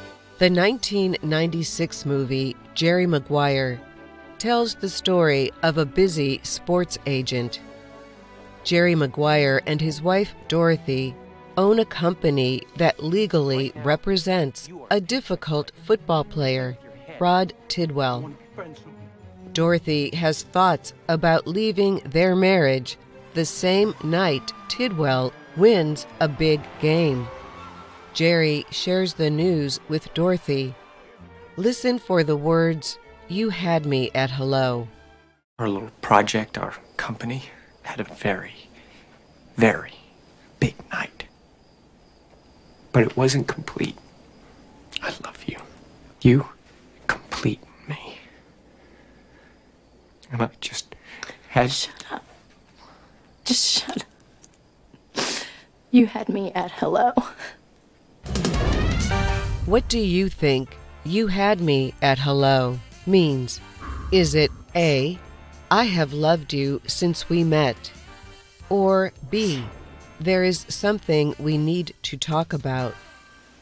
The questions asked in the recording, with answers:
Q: What do you think you had me at hello means?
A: The answer is A. I have loved you since we met.